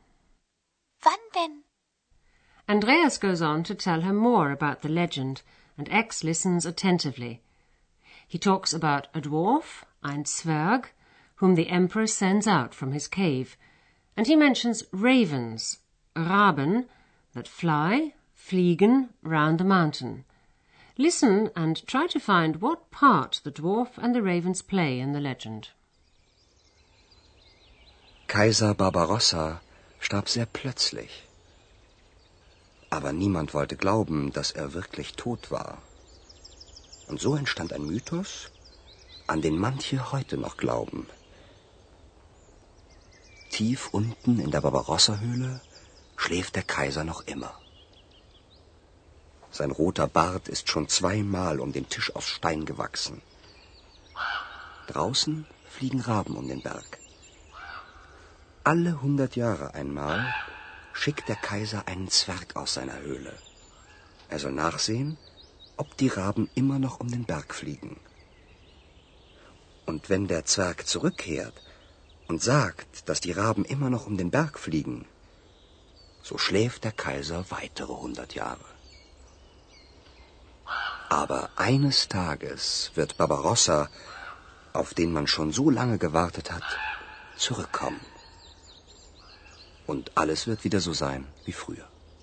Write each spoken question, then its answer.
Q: Listen and try to find what part the dwarf and the ravens play in the legend.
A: Once every hundred years, Barbarossa sends a dwarf out of his cave.